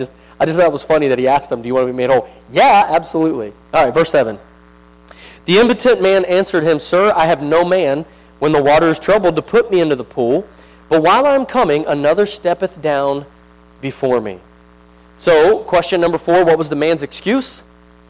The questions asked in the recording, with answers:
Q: what was the man's excuse?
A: Blamed others.